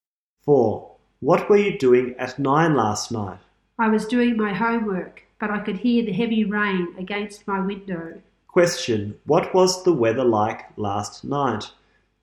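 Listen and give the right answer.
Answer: Heavy rain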